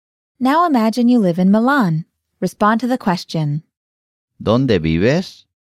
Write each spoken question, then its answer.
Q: ¿Dónde vives?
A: Vivo en Milán.